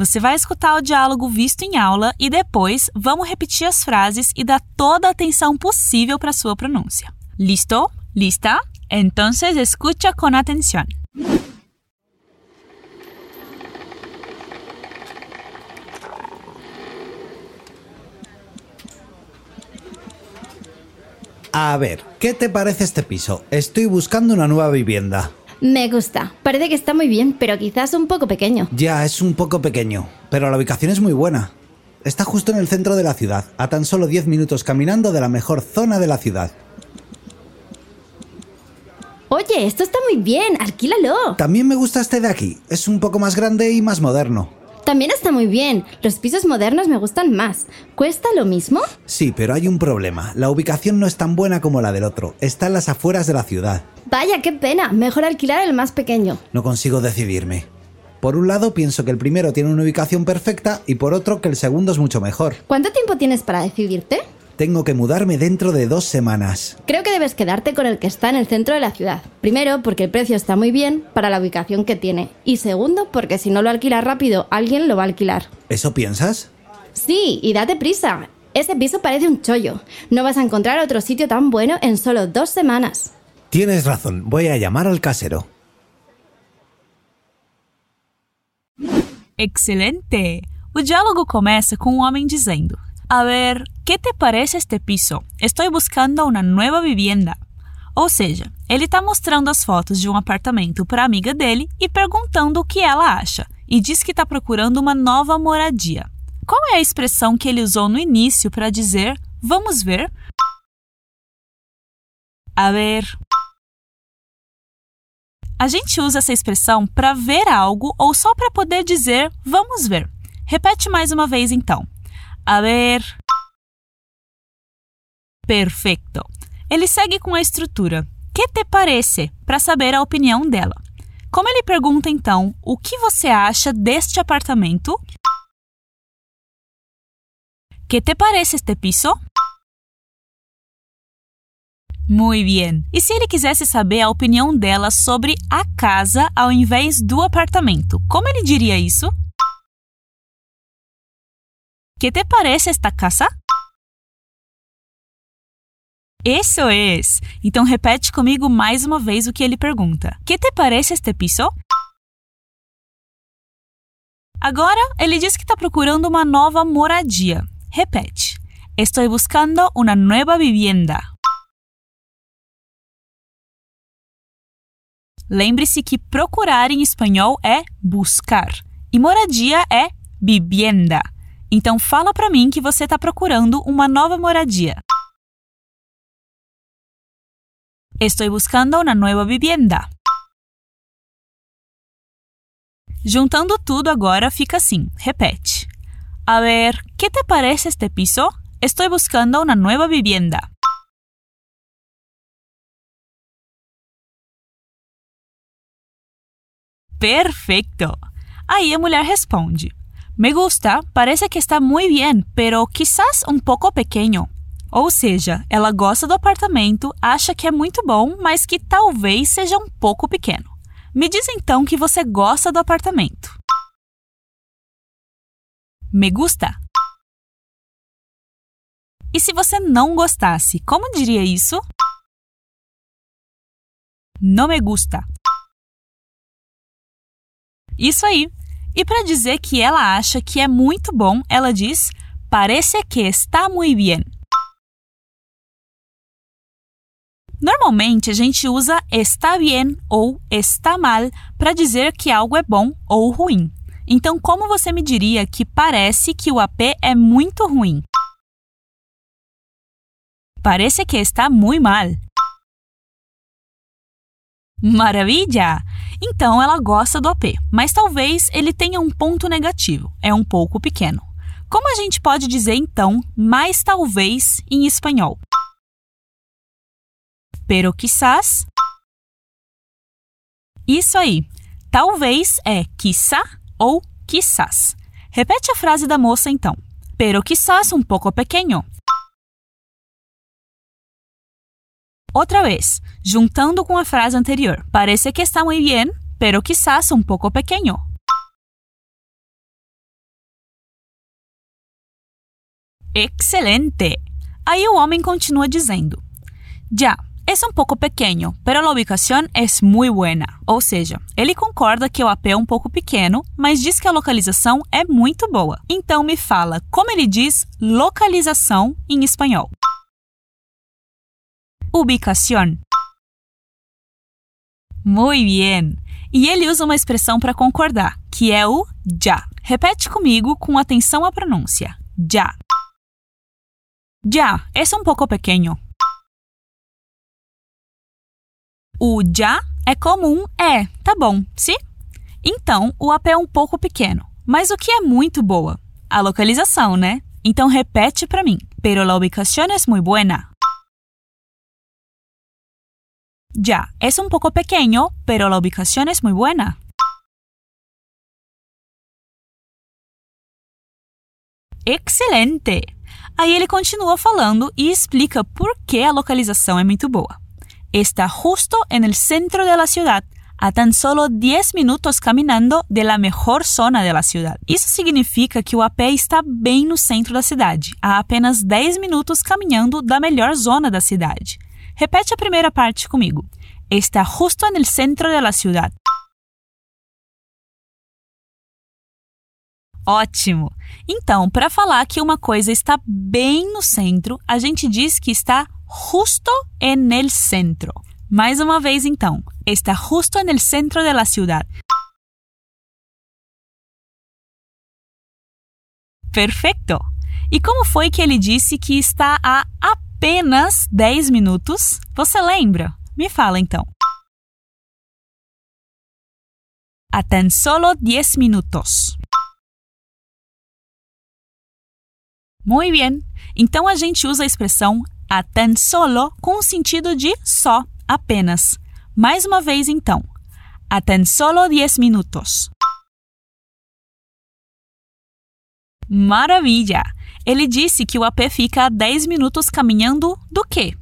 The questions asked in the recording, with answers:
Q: Ele disse que o AP fica a 10 minutos caminhando do quê?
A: De la mejor zona de la ciudad, ¿verdad?